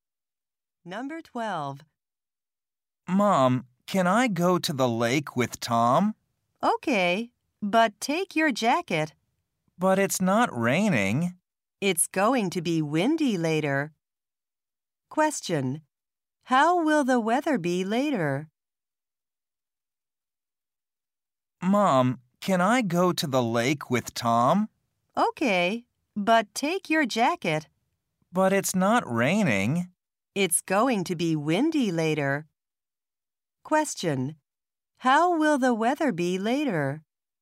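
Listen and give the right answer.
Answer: Windy.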